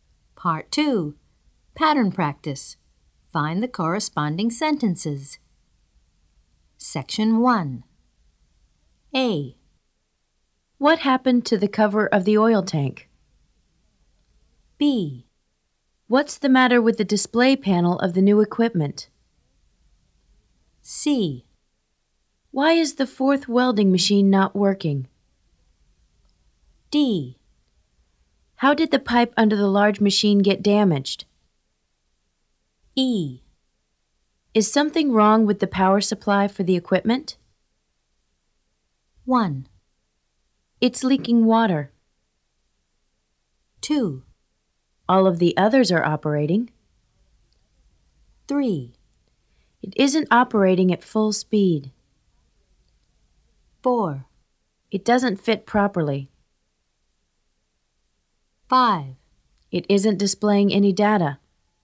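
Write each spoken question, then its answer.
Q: What happened to the cover of the oil tank?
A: 4: It doesn't fit properly.

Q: What's the matter with the display panel of the new equipment?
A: 5: It isn't displaying any data.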